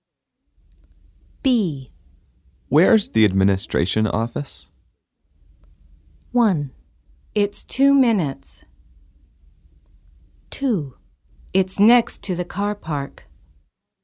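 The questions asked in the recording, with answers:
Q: Where's the administration office?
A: 2: It's next to the car park.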